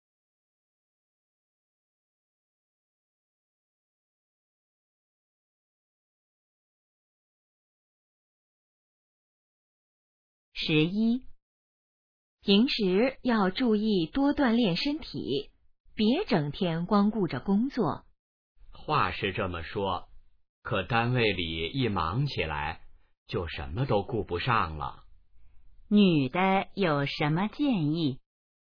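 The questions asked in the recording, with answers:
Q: 女的有什么建议?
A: 多锻炼身体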